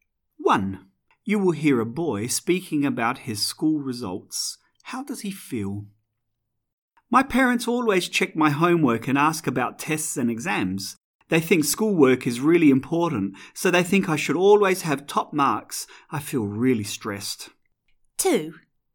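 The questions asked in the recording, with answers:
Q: How does he feel?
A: Stressed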